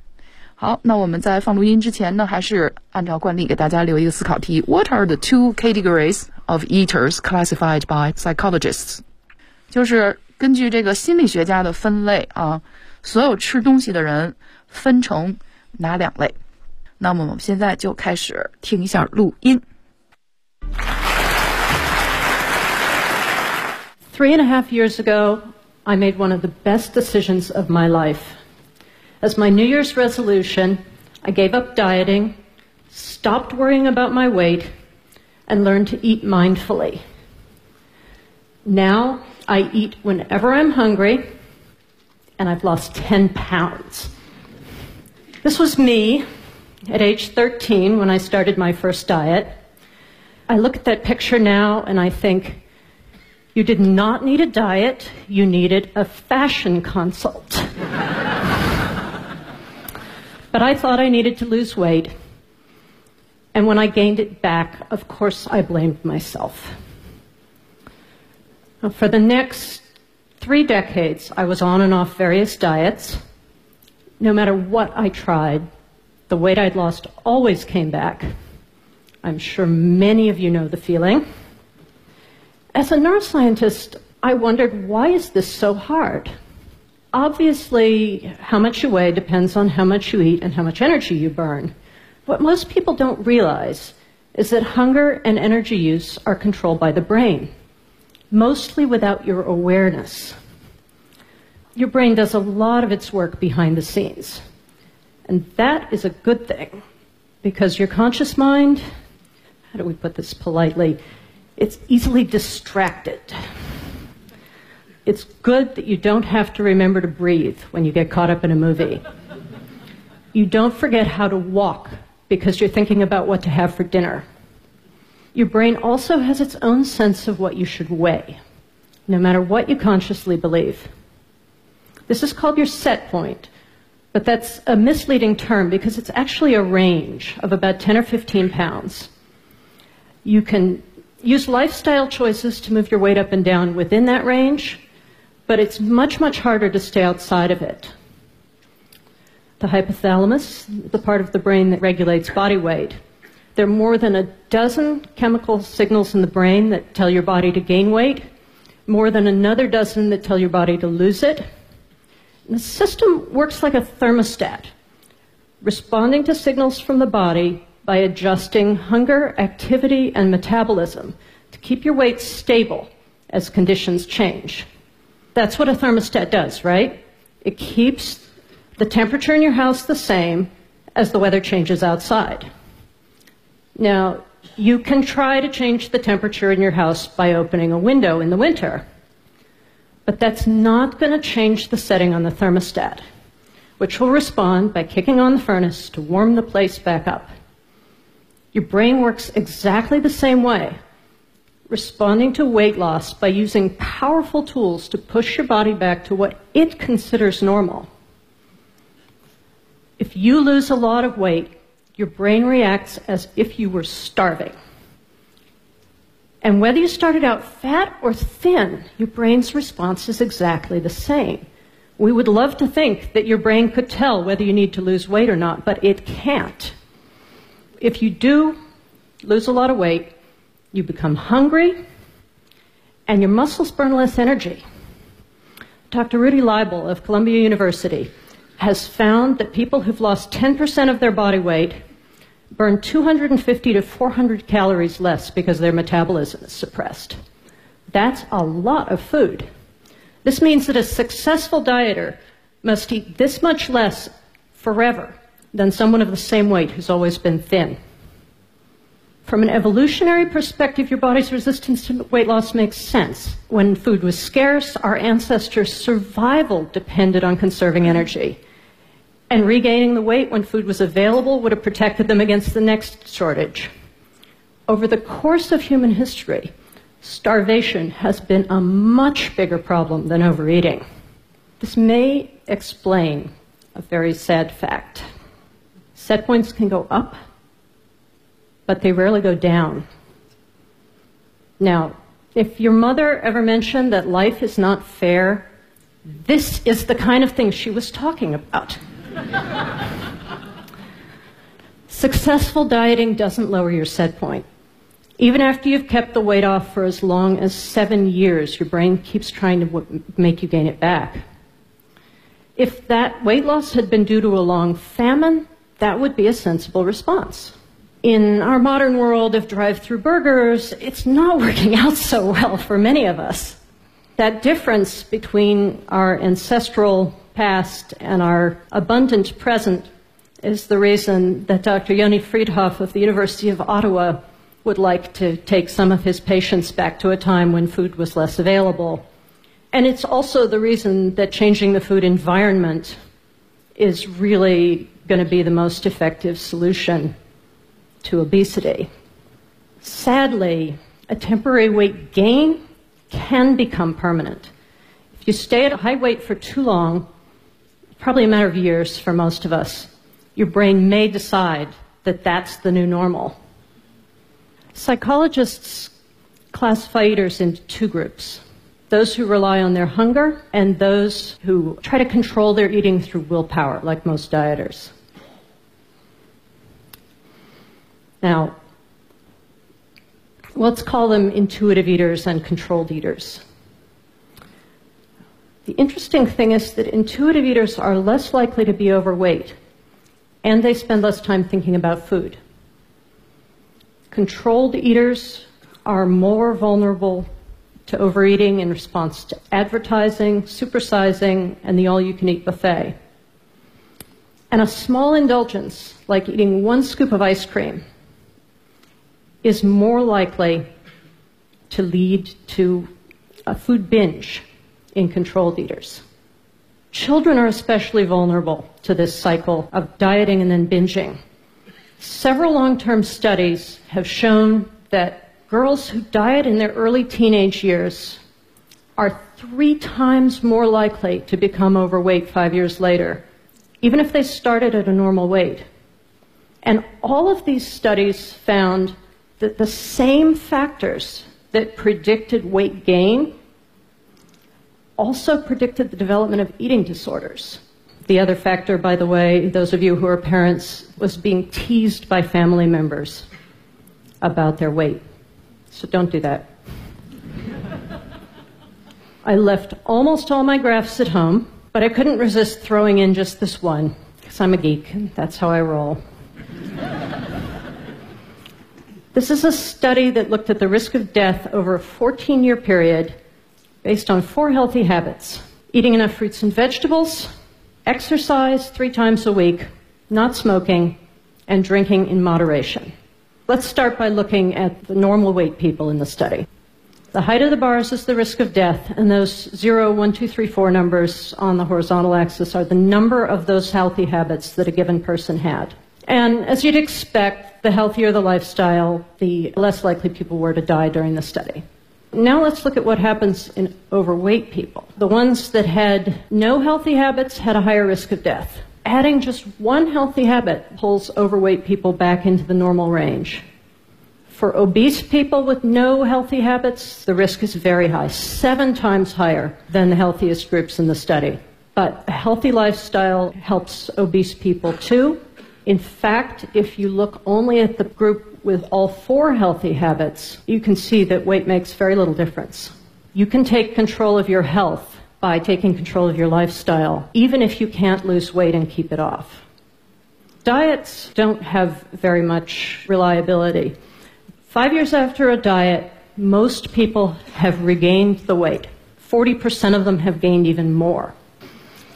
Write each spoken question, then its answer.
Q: What are the two categories of eaters classified by psychologists?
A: Let's call them intuitive eaters and controlled eaters。